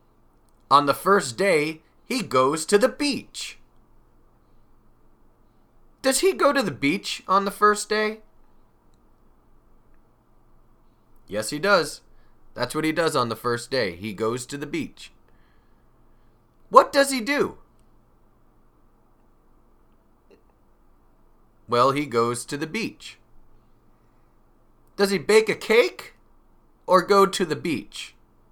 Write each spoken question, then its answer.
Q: Does he bake a cake or go to the beach?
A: He goes to the beach.